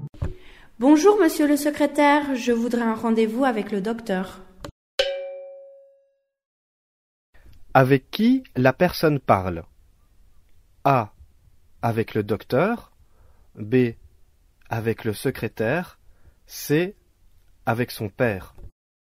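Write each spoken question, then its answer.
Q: Avec qui la personne parle?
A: B: Avec le secrétaire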